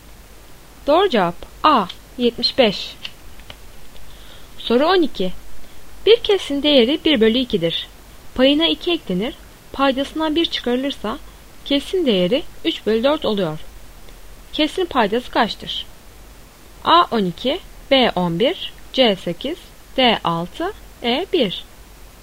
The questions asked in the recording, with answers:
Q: Kesrin paydası kaçtır?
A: Doğru cevap B 11.